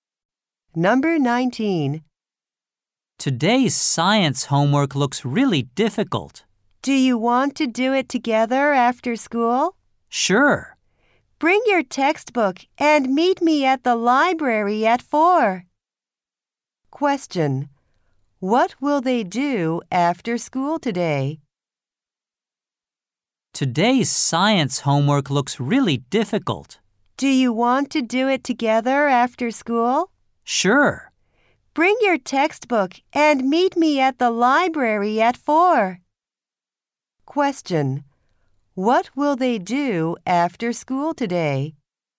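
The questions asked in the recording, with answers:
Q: What will they do after school today?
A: Do science homework together at the library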